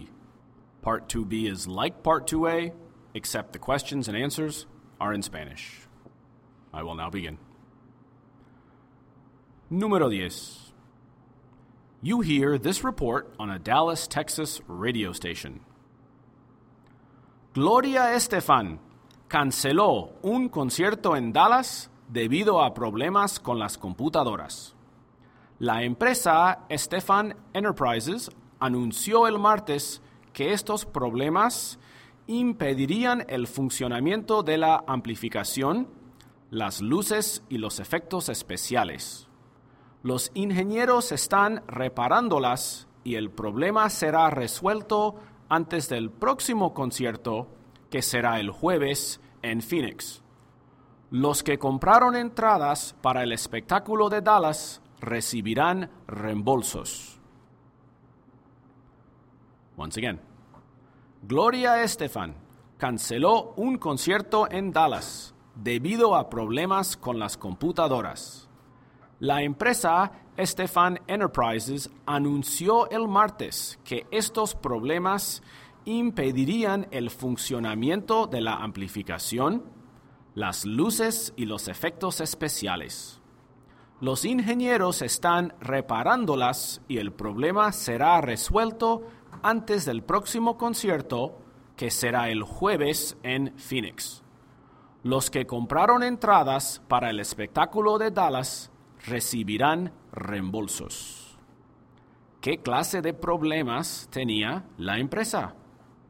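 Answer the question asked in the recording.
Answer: Problemas con las computadoras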